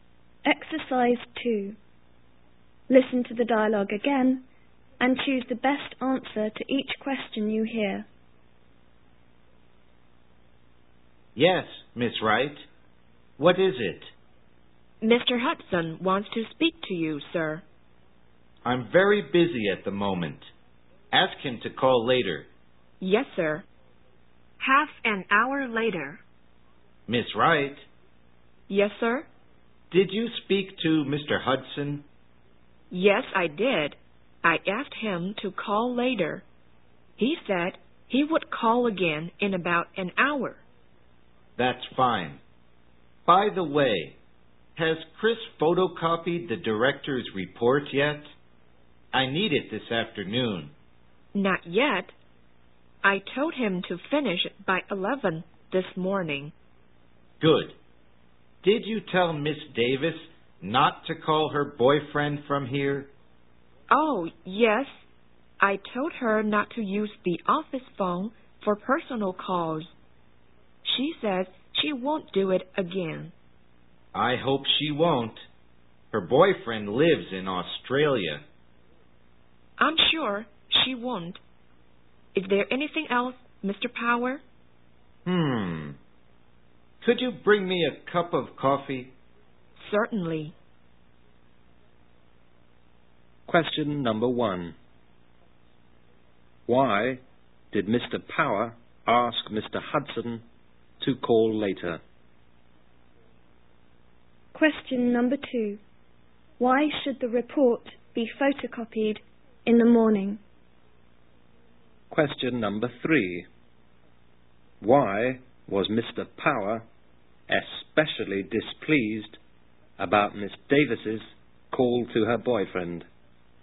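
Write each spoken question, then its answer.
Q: Why did Mr. Power ask Mr. Hudson to call later?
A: He was very busy at the moment

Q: Why should the report be photocopied in the morning?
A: Mr. Power needs it this afternoon

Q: Why was Mr. Power especially displeased about Miss Davis's call to her boyfriend?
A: Her boyfriend lives in Australia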